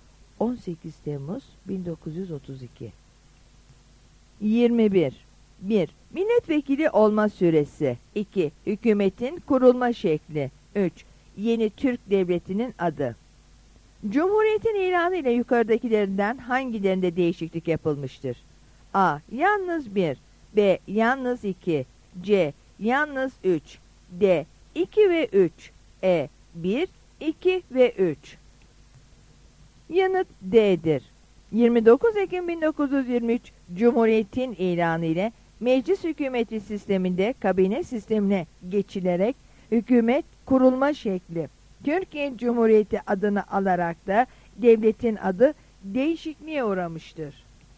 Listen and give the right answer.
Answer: Yanıt D'dir.